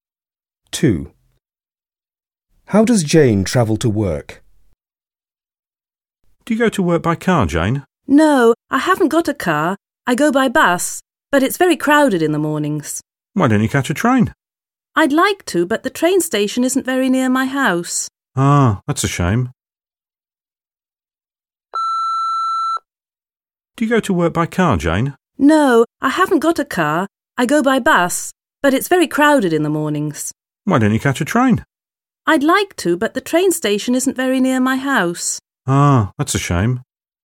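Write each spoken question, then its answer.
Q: How does Jane travel to work?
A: by bus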